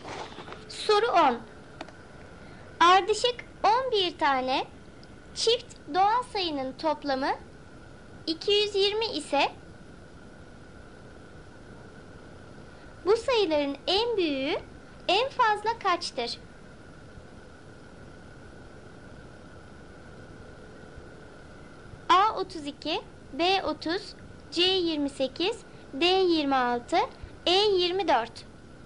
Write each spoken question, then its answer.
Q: bu sayıların en büyüğü en fazla kaçtır?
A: Doğru cevap B 30.